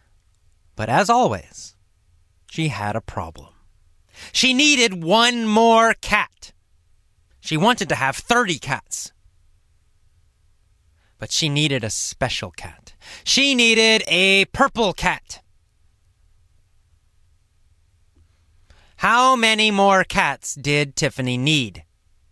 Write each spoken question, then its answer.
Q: How many more cats did Tiffany need?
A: Well, only one. Tiffany needed only one more cat.